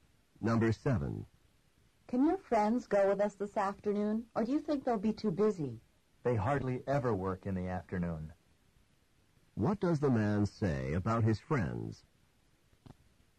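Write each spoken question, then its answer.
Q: What does the man say about his friends?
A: They're rarely busy in the afternoon, so they can probably come.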